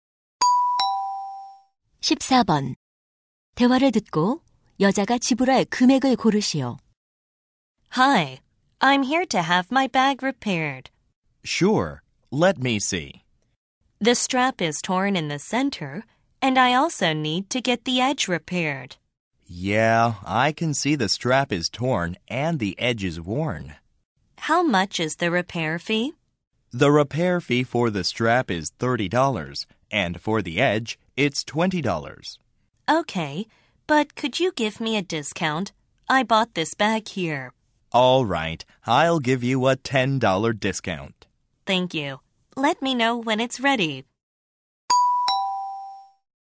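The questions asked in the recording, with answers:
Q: 대화를 듣고 여자가 지불할 금액을 고르시오.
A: $40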